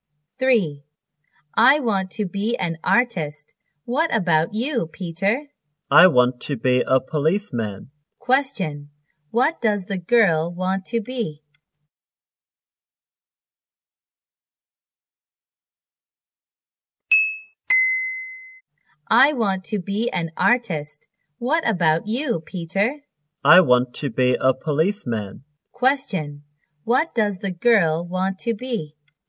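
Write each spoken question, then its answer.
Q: What does the girl want to be?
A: An artist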